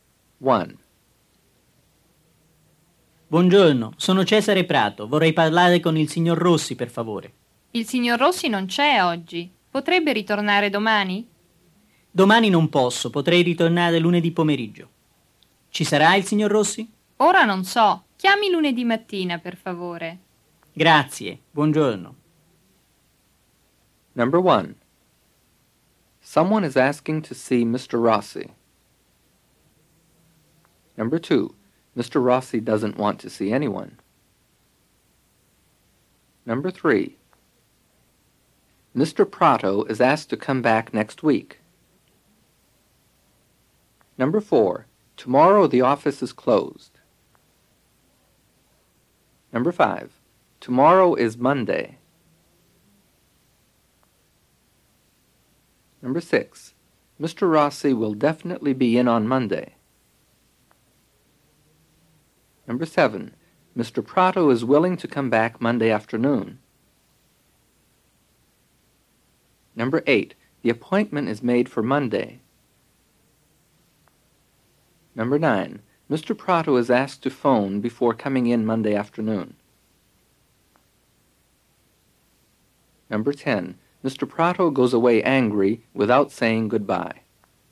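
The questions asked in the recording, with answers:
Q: Someone is asking to see Mr. Rossi.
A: True

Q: Mr. Rossi doesn't want to see anyone.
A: False

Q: Mr. Prato is asked to come back next week.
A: False

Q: Tomorrow is Monday.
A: False

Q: Mr. Rossi will definitely be in on Monday.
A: False

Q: Mr. Prato is willing to come back Monday afternoon.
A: True

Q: Mr. Prato goes away angry without saying goodbye.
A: False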